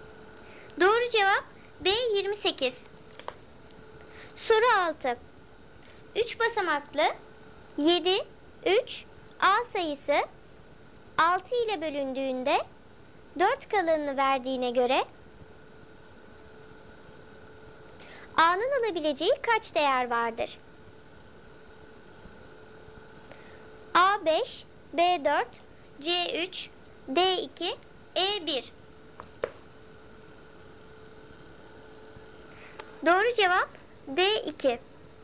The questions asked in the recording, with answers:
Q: A'nın alabileceği kaç değer vardır?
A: Doğru cevap D2.